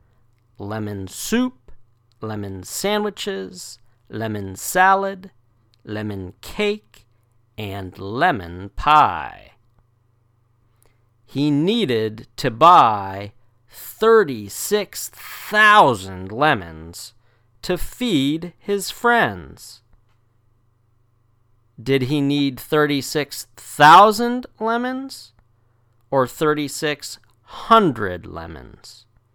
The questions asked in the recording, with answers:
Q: Did he need 36,000 lemons or 3,600 lemons?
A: 36,000. He needed to buy 36,000 lemons.